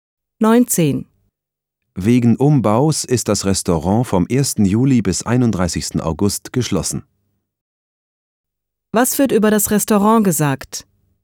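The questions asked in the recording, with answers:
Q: Was wird über das Restaurant gesagt?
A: Es ist wegen Umbaus vom 1. Juli bis 31. August geschlossen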